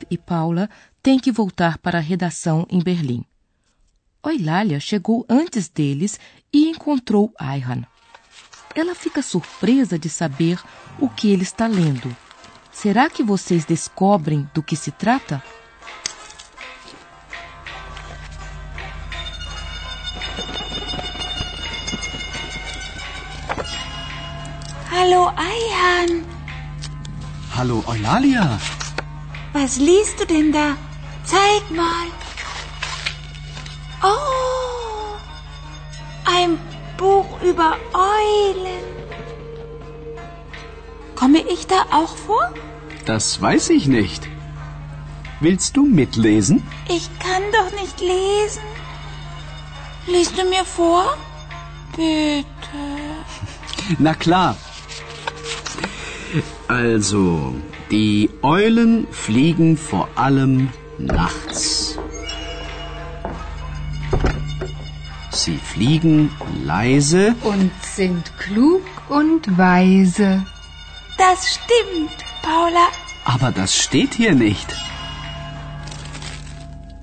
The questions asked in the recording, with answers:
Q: Será que vocês descobrem do que se trata?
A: Ayhan leu um livro. O verbo é ler e o livro é sobre corujas.